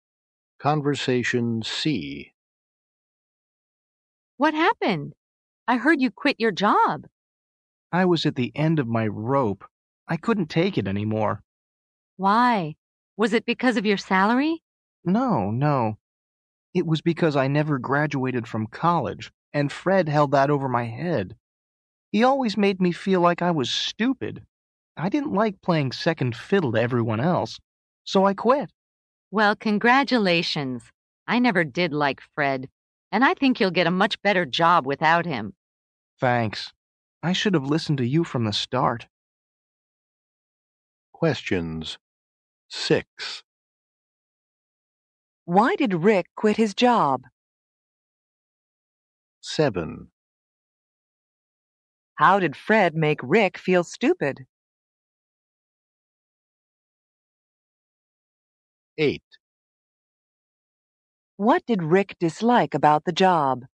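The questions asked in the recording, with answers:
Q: Why did Rick quit his job?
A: He was at the end of his rope; Fred held it over his head that he never graduated from college.

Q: How did Fred make Rick feel stupid?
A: He held it over Rick's head that Rick never graduated from college.

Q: What did Rick dislike about the job?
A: Playing second fiddle to everyone else.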